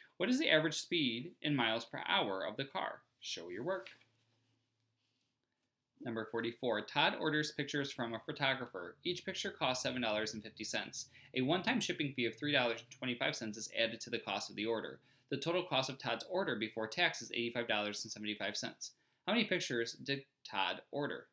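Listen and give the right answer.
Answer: 11 pictures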